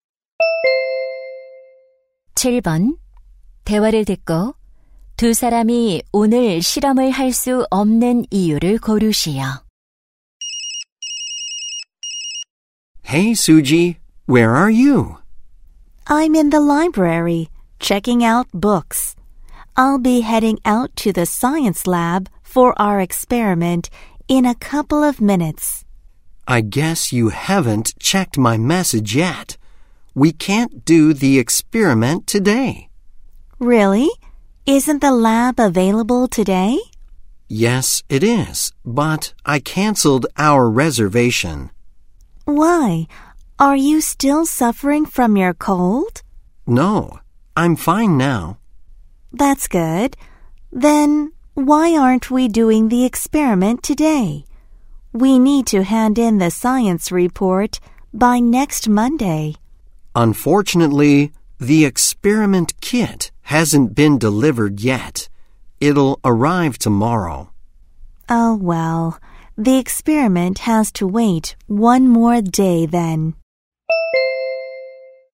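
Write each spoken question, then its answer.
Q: 대화를 듣고 두 사람이 오늘 실험을 할 수 없는 이유를 고르시오.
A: 실험 키트가 아직 배달되지 않아서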